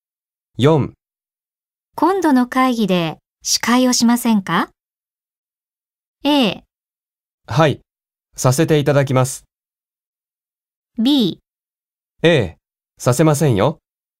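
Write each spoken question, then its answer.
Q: 今度の会議で司会をしませんか?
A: A: はい、させていただきます。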